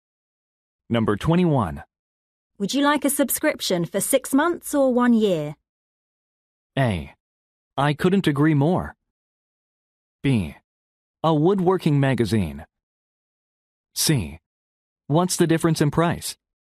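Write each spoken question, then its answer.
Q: Would you like a subscription for 6 months or 1 year?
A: C: What's the difference in price?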